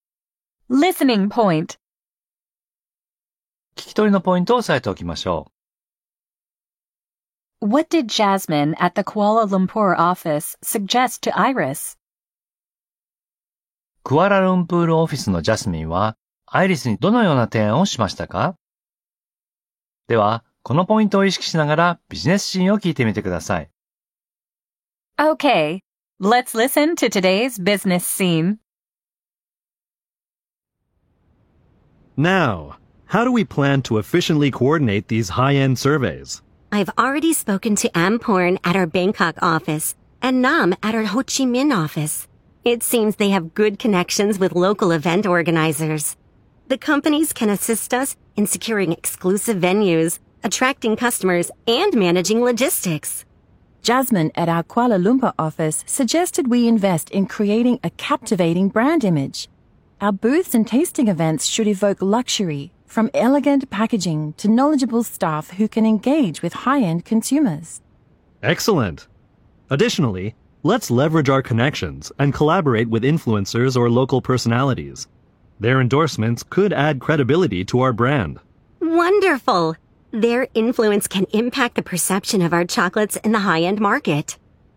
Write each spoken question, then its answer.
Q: What did Jasmine at the Kuala Lumpur office suggest to Iris?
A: She suggested they invest in creating a captivating brand image.